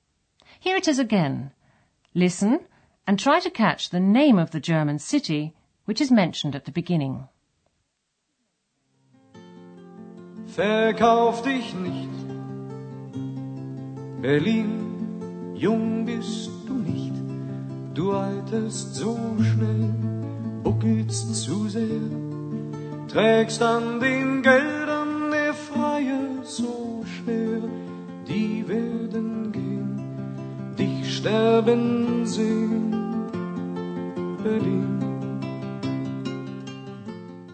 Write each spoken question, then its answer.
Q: Listen and try to catch the name of the German city which is mentioned at the beginning.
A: Berlin. Berlin.